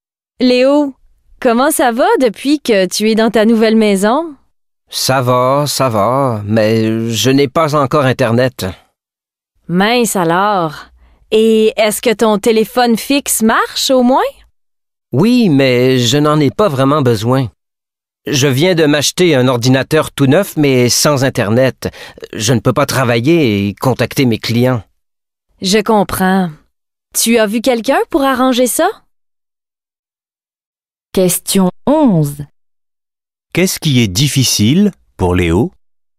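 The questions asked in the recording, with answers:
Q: Qu'est-ce qui est difficile pour Léo?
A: Il n'a pas encore Internet, donc il ne peut pas travailler ni contacter ses clients.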